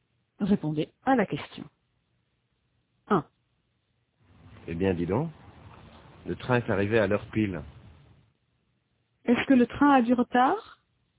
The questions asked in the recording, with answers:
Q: Est-ce que le train a du retard?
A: Non, il est arrivé à l'heure pile.